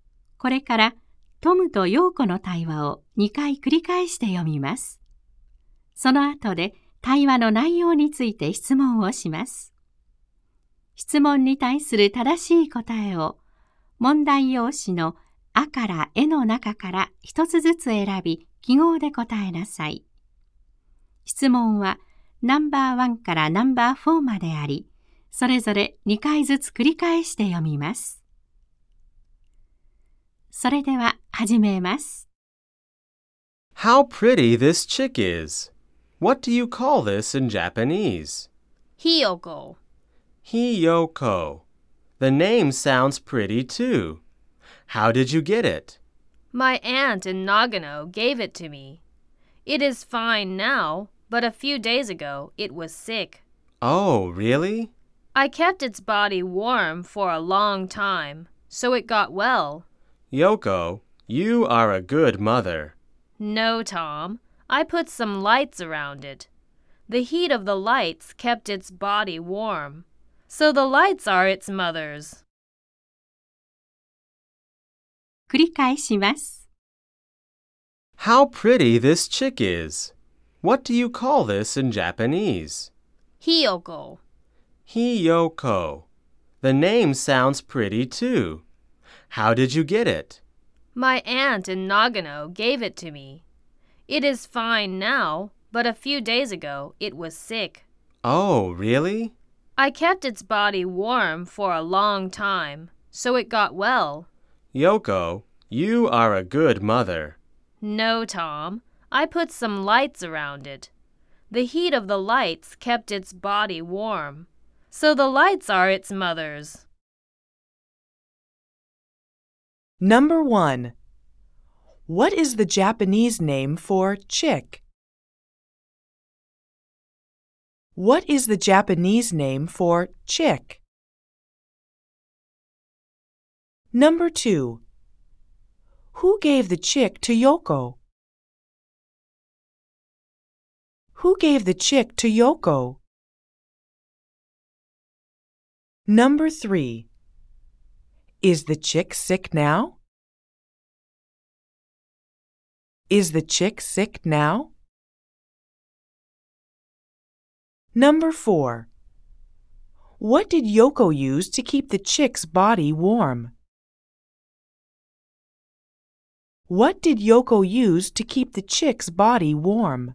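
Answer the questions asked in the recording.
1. Hiyoko.
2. Her aunt in Nagano.
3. No, it isn't.
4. Some lights.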